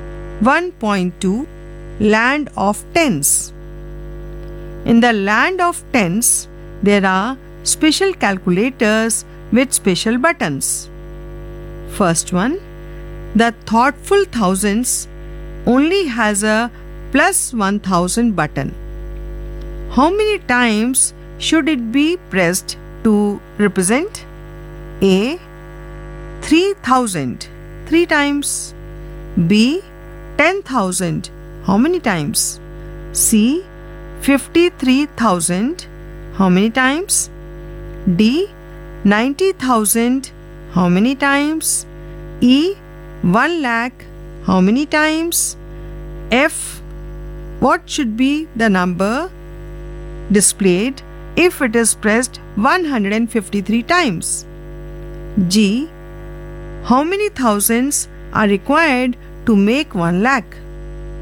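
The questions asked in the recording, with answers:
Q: B 10,000, how many times?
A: 10 times

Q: C 53,000, how many times?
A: 53 times

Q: D 90,000, how many times?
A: 90 times

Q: E 1 lakh, how many times?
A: 100 times

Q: F, what should be the number displayed if it is pressed 153 times?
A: 1,53,000

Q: G, how many thousands are required to make 1 lakh?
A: 100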